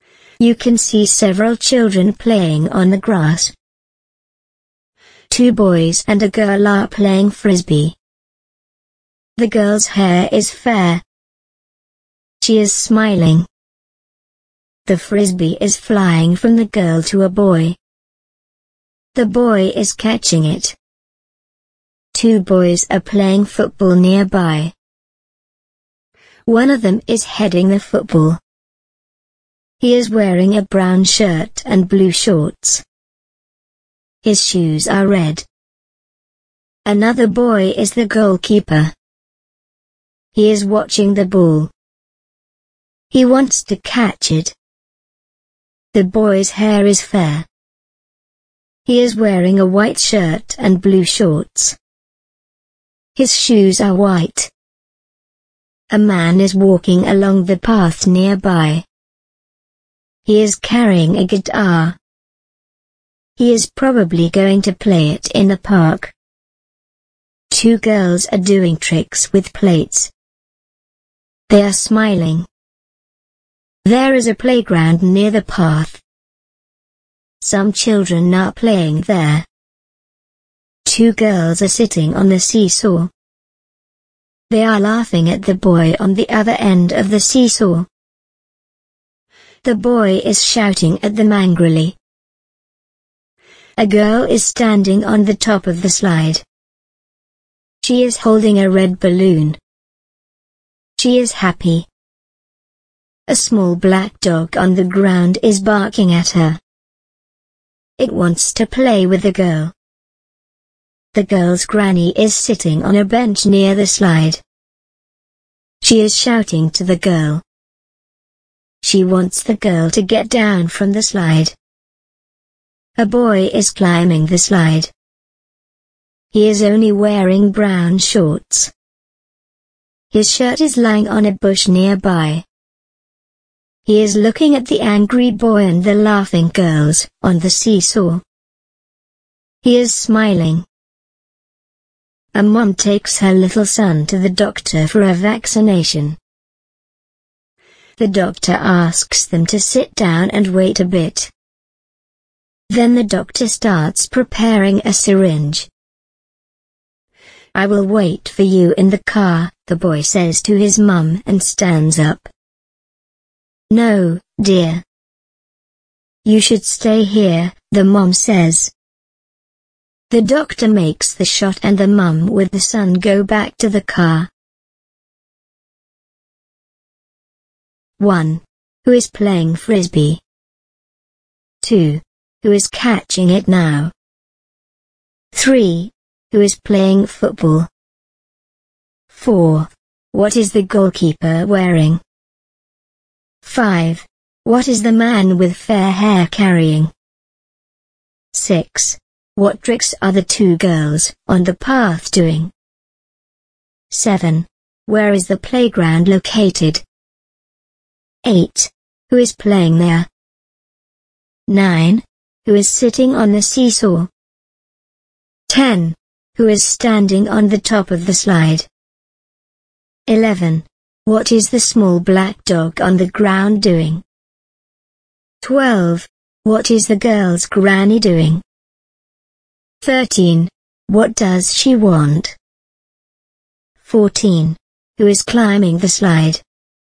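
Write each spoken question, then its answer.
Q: Who is playing frisbee?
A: Two boys and a girl

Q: Who is catching it now?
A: A boy

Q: Who is playing football?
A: Two boys

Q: What is the goalkeeper wearing?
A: A white shirt, blue shorts and white shoes

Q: What is the man with fair hair carrying?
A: A guitar

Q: What tricks are the two girls on the path doing?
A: Tricks with plates

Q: Where is the playground located?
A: Near the path

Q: Who is playing there?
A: Some children

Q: Who is sitting on the seesaw?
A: Two girls and a boy

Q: Who is standing on the top of the slide?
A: A girl holding a red balloon

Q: What is the small black dog on the ground doing?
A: Barking at the girl

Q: What is the girl's granny doing?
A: Sitting on a bench and shouting to the girl

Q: What does she want?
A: She wants the girl to get down from the slide

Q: Who is climbing the slide?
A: A boy in brown shorts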